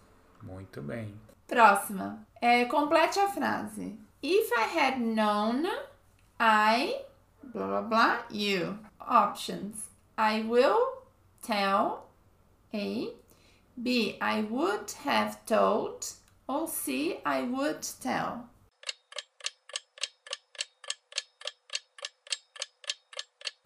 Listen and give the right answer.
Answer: Então aqui ficaria: If I had known, I would have told you.